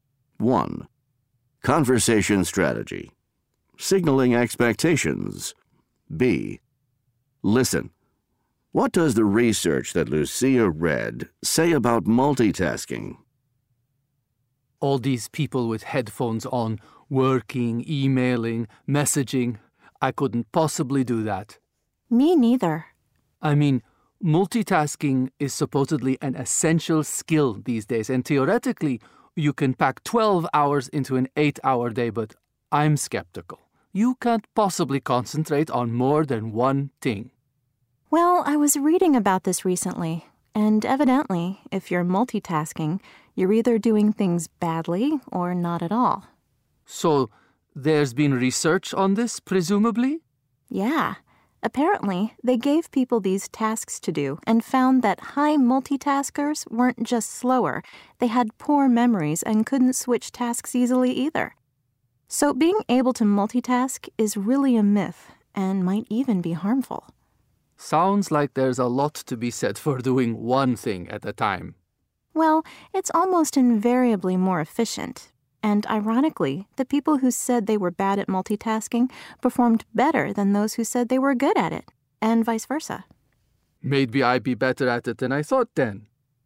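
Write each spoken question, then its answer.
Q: What does the research that Lucia read say about multitasking?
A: If you multitask you do things badly or not at all; high multitaskers were slower, had poor memories and couldn't switch tasks easily, so multitasking is a myth and may be harmful.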